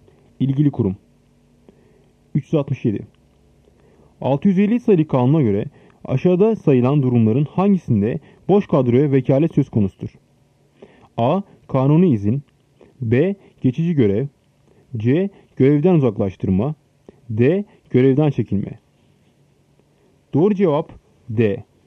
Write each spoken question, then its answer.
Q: 650 sayılı kanuna göre aşağıda sayılan durumların hangisinde boş kadroya vekalet söz konusudur?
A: Doğru cevap D. Görevden çekilme.